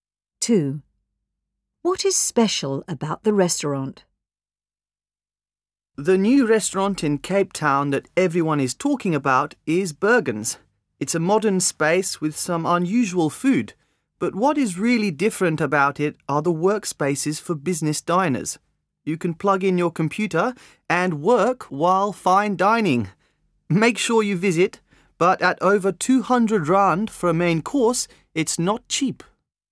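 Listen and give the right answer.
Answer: It has workspaces for business diners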